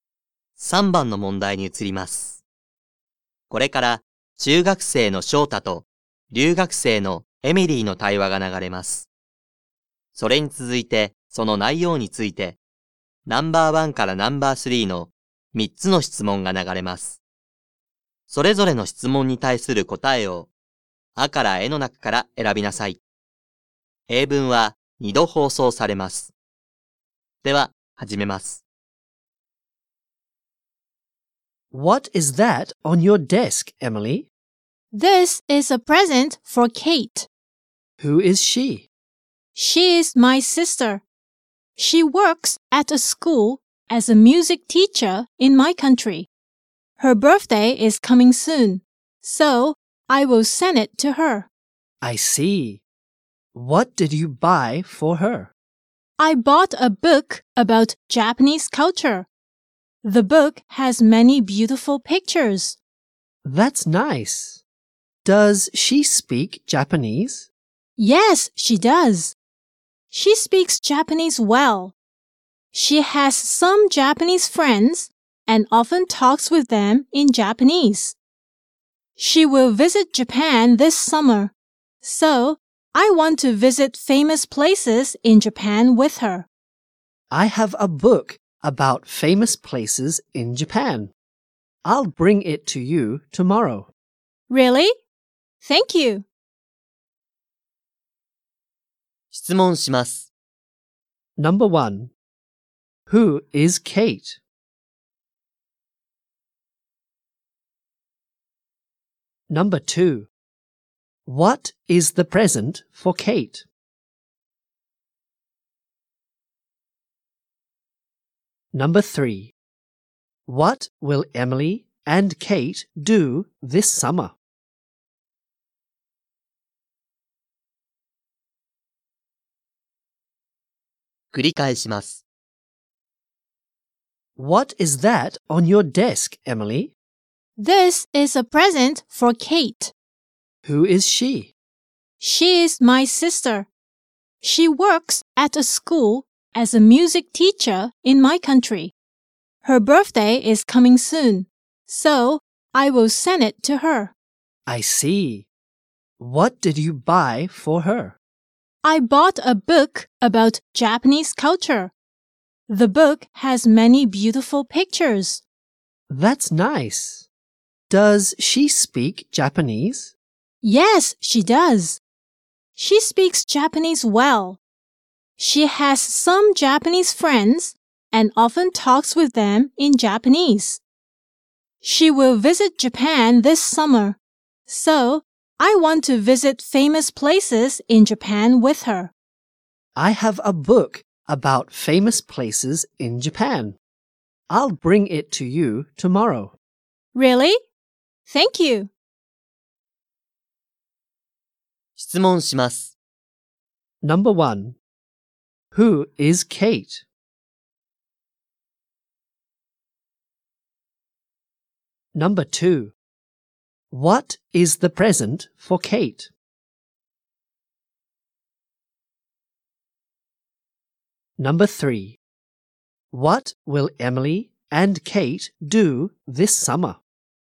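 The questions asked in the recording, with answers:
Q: Who is Kate?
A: Emily's sister, a music teacher

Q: What is the present for Kate?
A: A book about Japanese culture

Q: What will Emily and Kate do this summer?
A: Visit famous places in Japan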